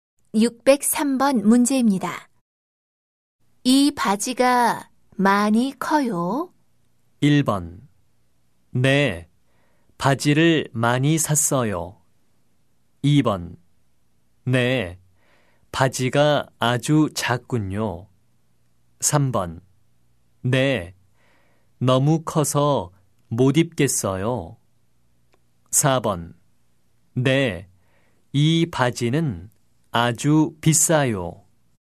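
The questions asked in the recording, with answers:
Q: 이 바지가 많이 커요?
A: 3: 네, 너무 커서 못 입겠어요.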